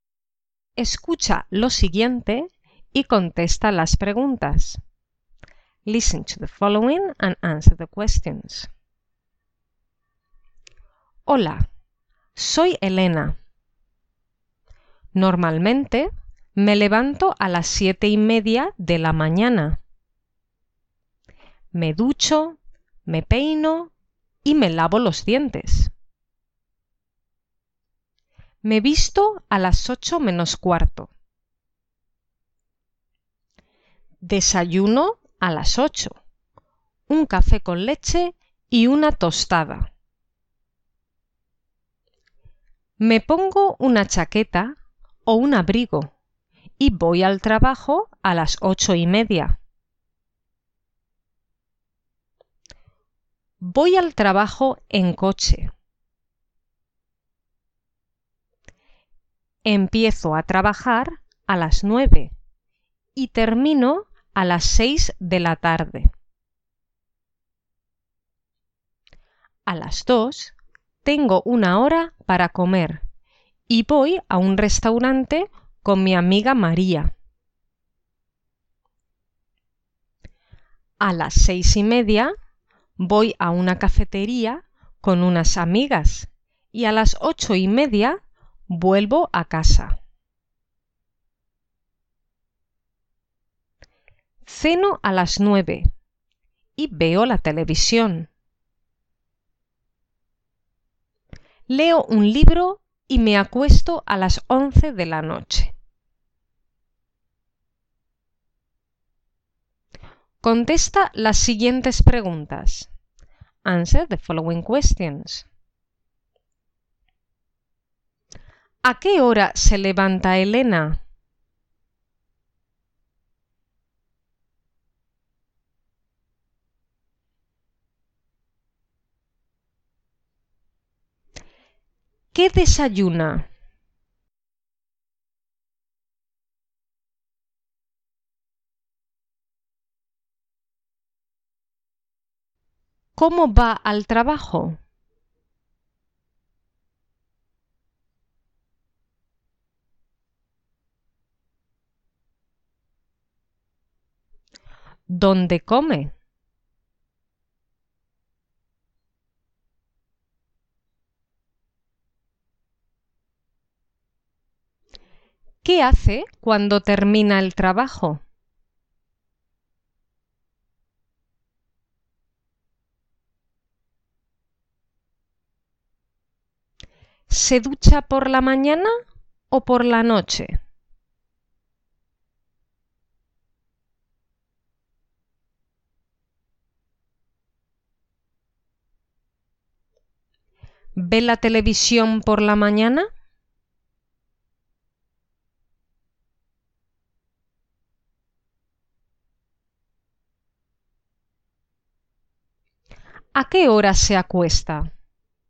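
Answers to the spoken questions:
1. A las 7:30 de la mañana
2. Un café con leche y una tostada
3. En coche
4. En un restaurante con su amiga María
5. Va a una cafetería con unas amigas
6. Por la mañana
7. No, la ve por la noche, después de cenar
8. A las 11 de la noche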